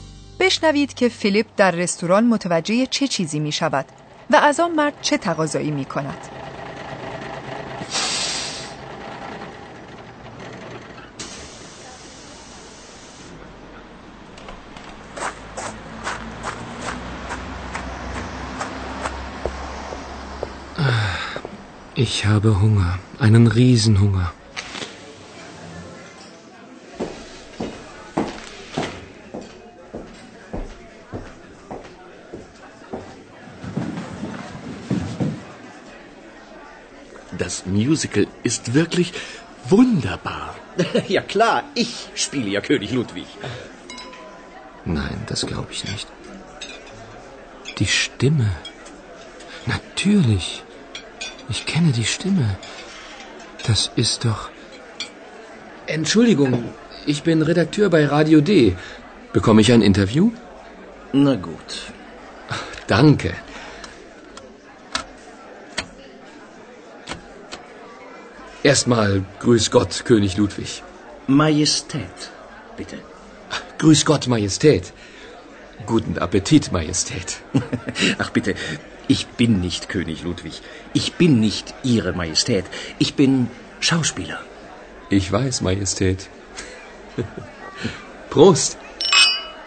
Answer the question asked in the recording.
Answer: Philipp به آن مرد میگوید که خبرنگار رادیو دی است و از او تقاضای یک مصاحبه میکند.